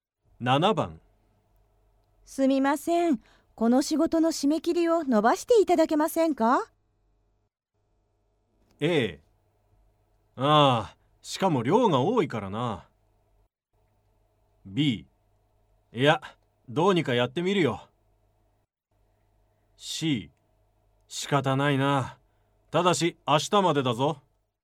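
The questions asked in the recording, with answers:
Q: すみません。この仕事の締め切りを伸ばしていただけませんか?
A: C: 仕方ないな。ただし明日までだぞ。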